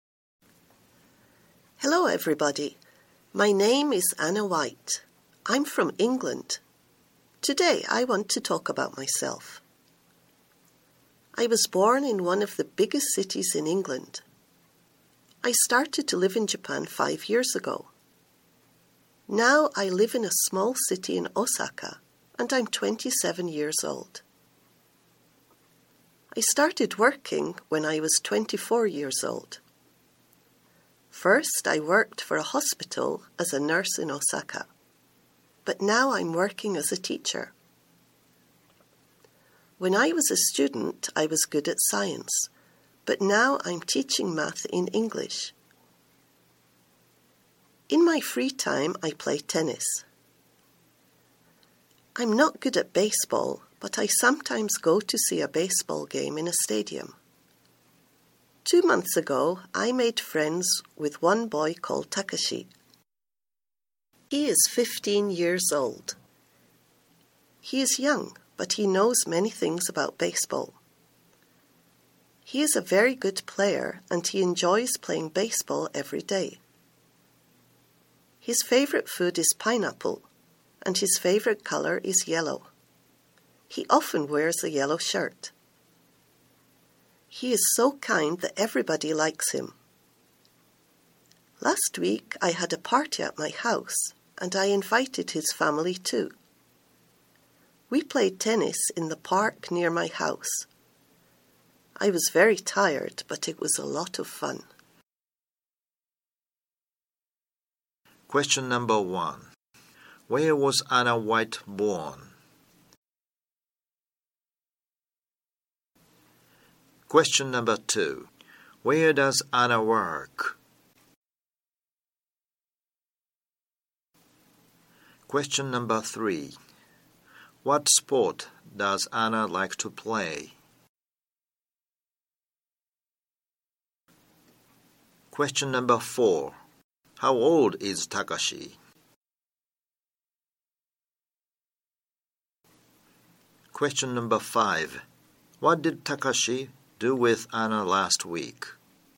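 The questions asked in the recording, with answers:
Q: Where was Anna White born?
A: In one of the biggest cities in England

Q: Where does Anna work?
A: At a school (as a teacher)

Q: What sport does Anna like to play?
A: Tennis

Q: How old is Takashi?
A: 15 years old

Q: What did Takashi do with Anna last week?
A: They played tennis in the park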